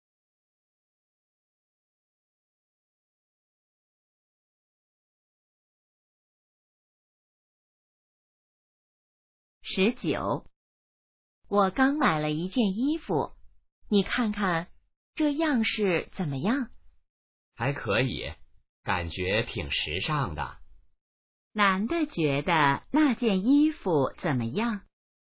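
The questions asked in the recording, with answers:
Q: 男的觉得那件衣服怎么样?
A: 挺时尚的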